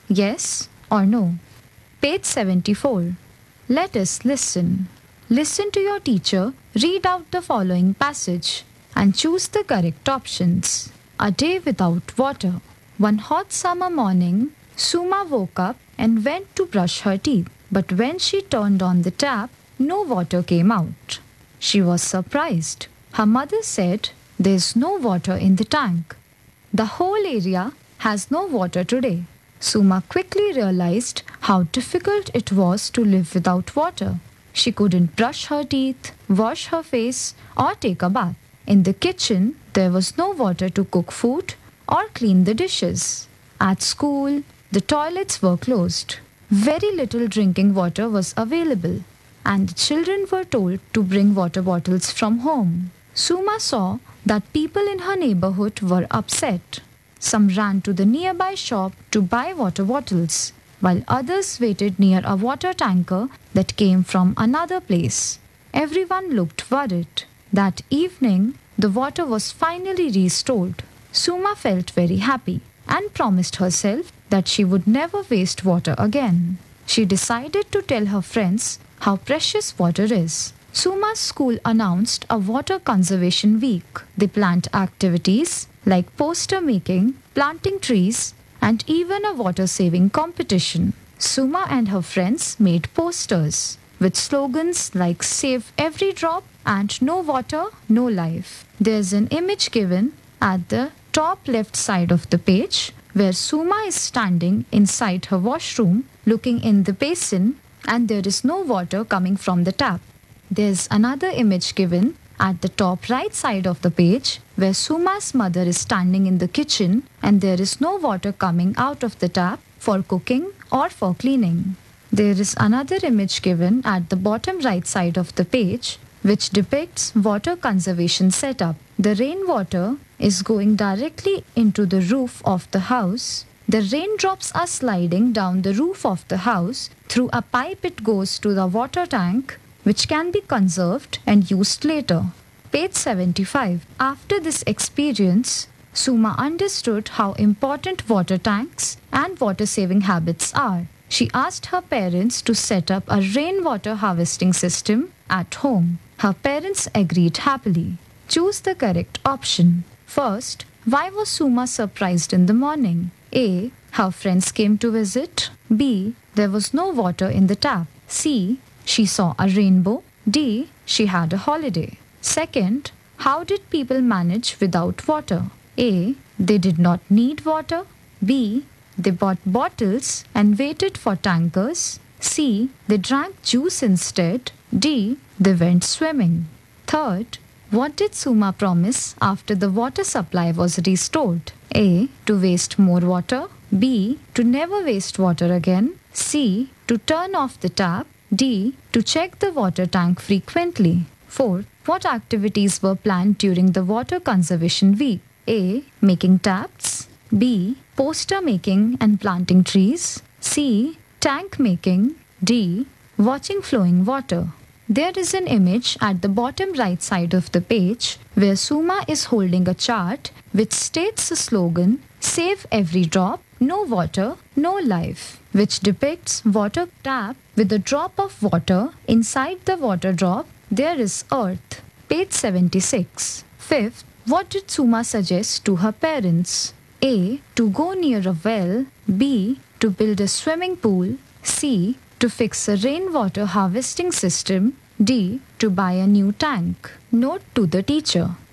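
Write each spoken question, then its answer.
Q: why was Suma surprised in the morning?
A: B: There was no water in the tap.

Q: how did people manage without water?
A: B: They bought bottles and waited for tankers.

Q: what did Suma promise after the water supply was restored?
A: B: To never waste water again.

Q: What activities were planned during the water conservation week?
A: B: Poster making and planting trees.

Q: what did Suma suggest to her parents?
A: C: To fix a rainwater harvesting system.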